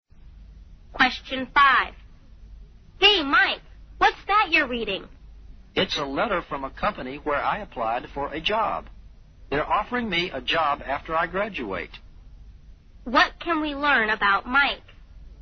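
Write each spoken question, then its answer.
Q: What can we learn about Mike?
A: He has been offered a job after he graduates.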